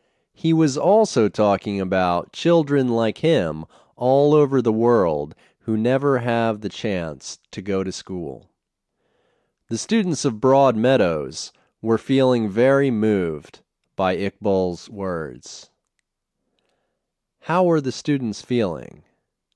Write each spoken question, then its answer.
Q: How were the students feeling?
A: The students were feeling very moved by Iqbal's words.